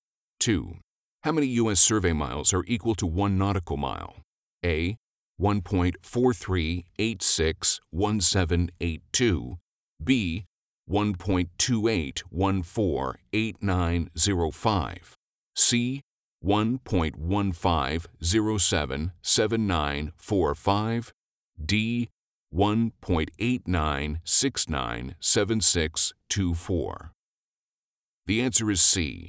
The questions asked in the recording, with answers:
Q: How many U.S. survey miles are equal to 1 nautical mile?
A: The answer is C.